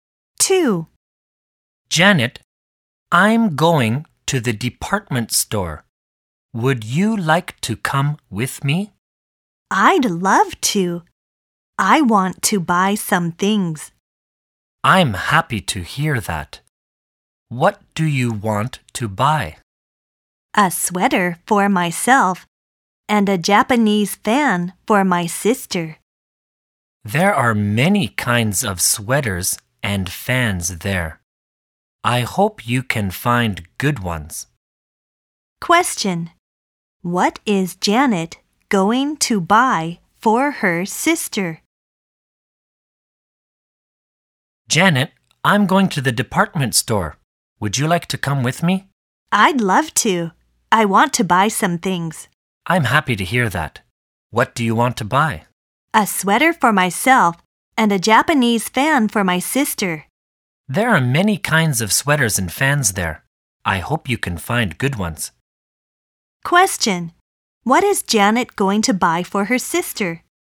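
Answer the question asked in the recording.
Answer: A Japanese fan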